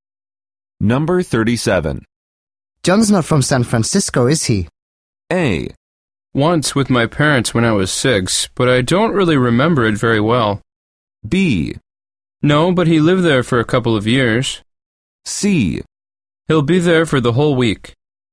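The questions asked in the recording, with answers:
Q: John's not from San Francisco, is he?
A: B: No, but he lived there for a couple of years.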